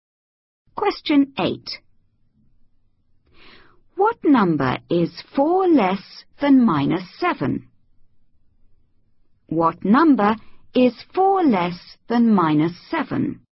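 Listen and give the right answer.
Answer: -11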